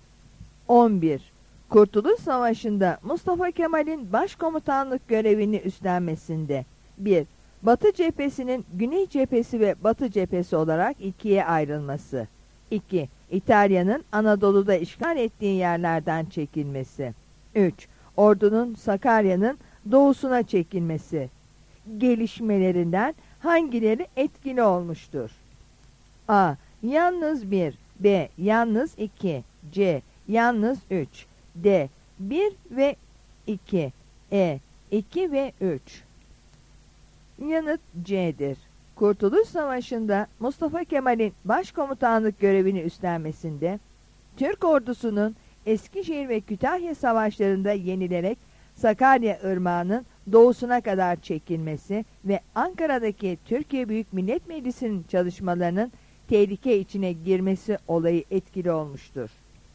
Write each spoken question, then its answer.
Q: Gelişmelerinden hangileri etkili olmuştur?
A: Yanıt C'dir.